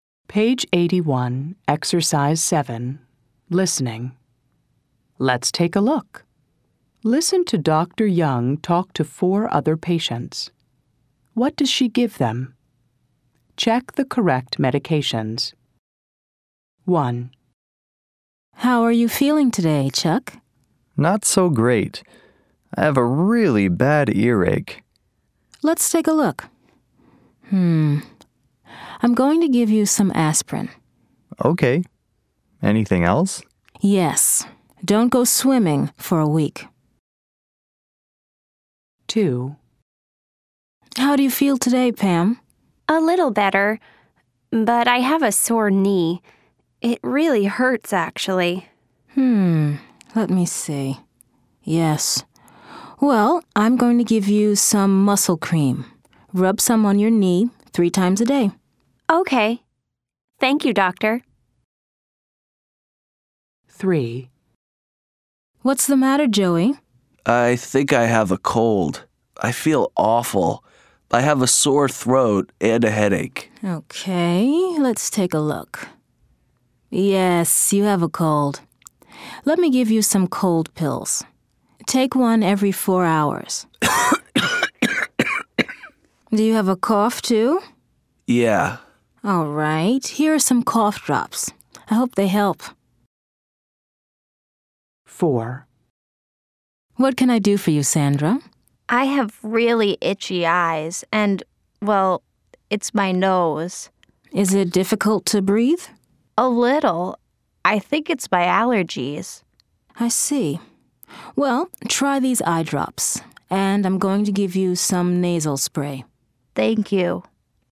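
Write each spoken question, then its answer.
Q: What does she give them?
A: Chuck: aspirin

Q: What does she give them?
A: Pam: muscle cream

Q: What does she give them?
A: Joey: cold pills and cough drops

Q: What does she give them?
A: Sandra: eye drops and nasal spray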